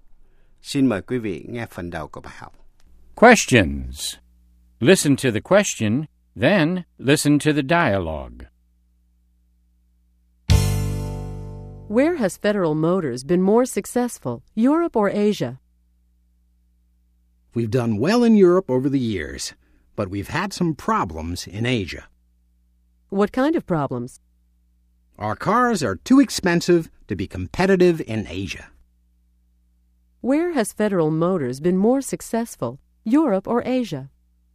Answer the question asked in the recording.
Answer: They've been more successful in Europe.